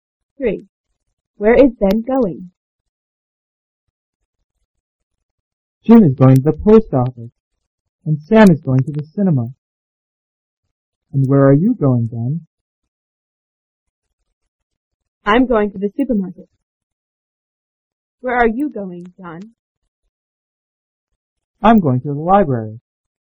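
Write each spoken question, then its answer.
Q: Where is Ben going?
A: To the supermarket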